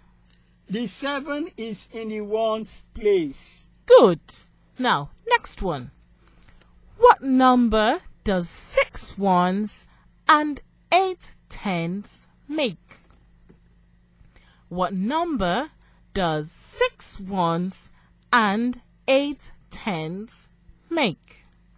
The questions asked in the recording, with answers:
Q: What number does 6 ones and 8 tens make?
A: So 8 tens and 6 ones makes 86.